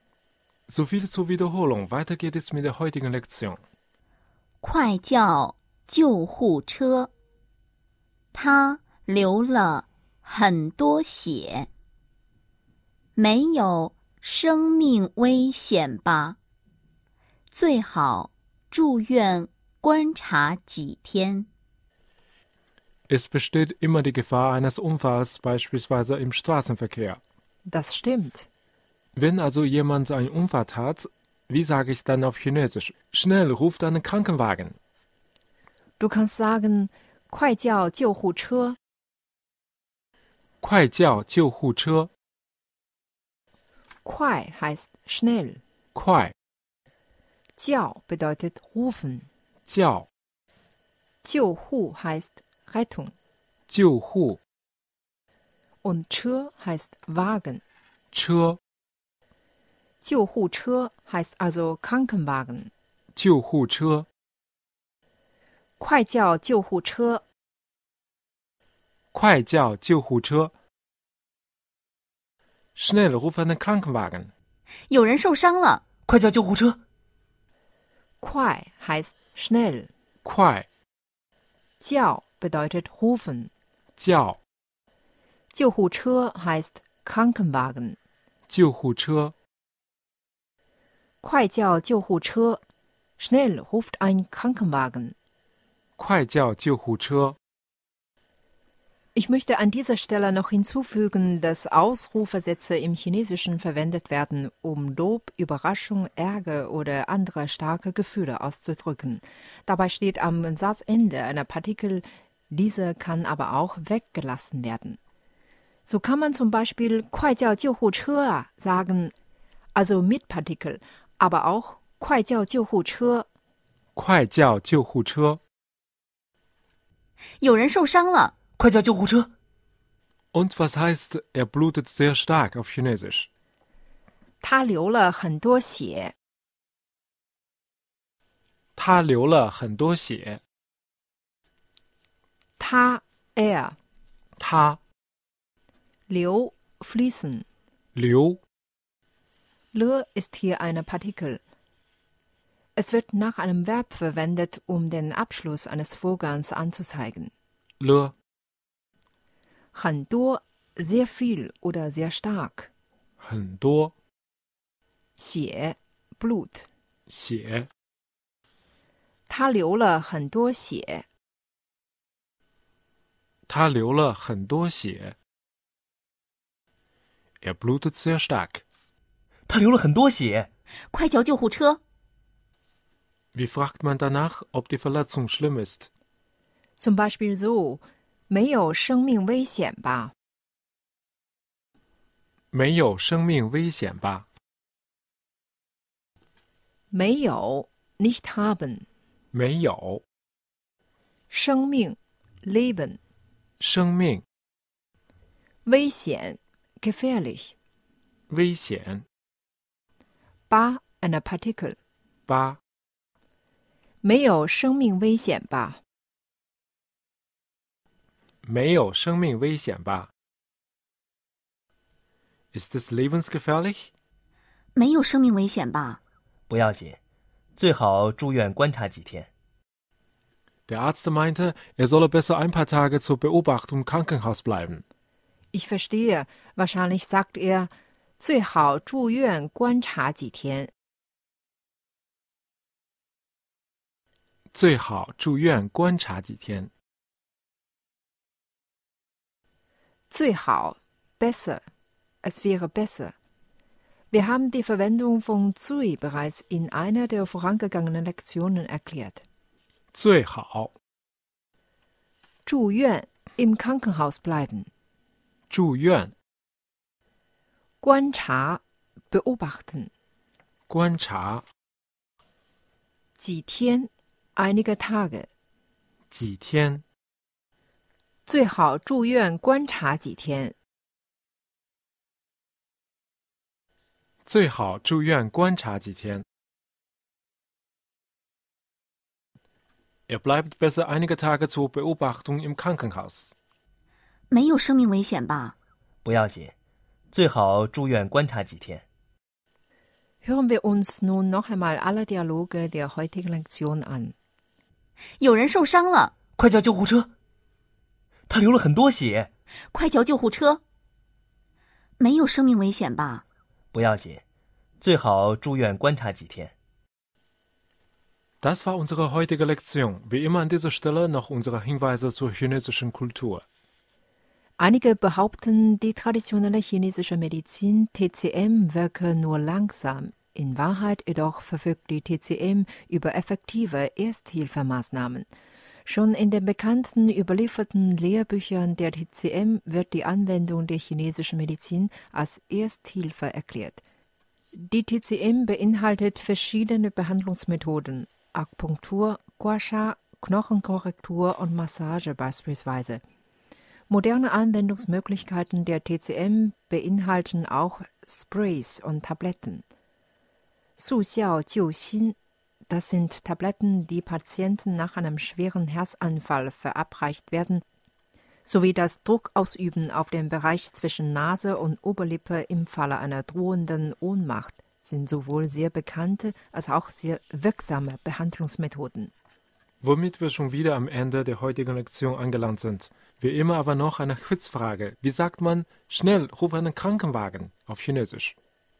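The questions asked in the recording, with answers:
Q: Wie sagt man, schnell, ruf einen Krankenwagen auf Chinesisch?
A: 快叫救护车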